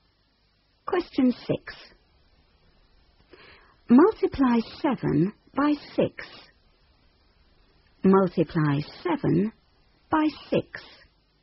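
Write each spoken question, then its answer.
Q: Multiply 7 by 6.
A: 42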